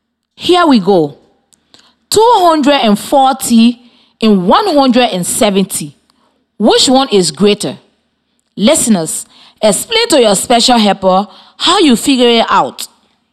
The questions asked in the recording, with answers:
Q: 240 and 170. Which one is greater?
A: I think 240 is more than 170.